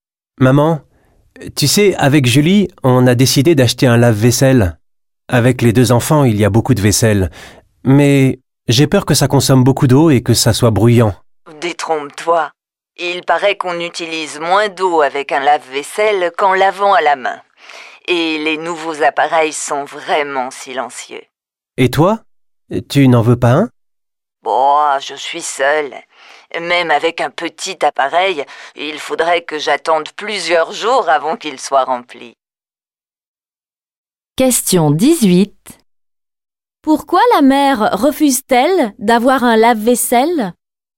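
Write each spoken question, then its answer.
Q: Pourquoi la mère refuse-t-elle d'avoir un lave-vaisselle?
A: Parce qu'elle vit seule et qu'elle devrait attendre plusieurs jours avant qu'il soit rempli.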